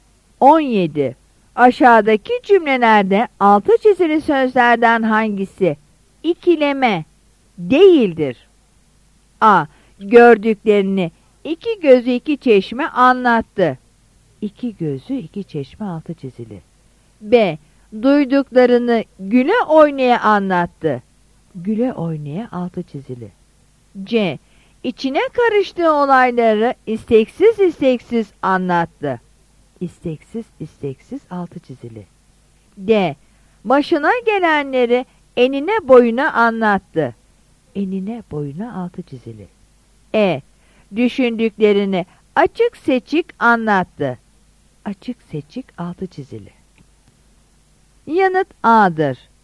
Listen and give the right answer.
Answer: Yanıt A'dır.